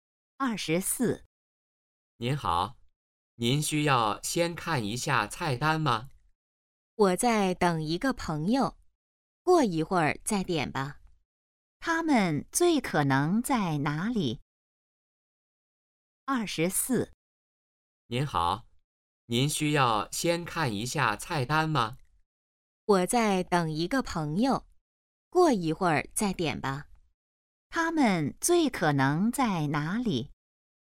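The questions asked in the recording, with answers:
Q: 他们最可能在哪里?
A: 饭馆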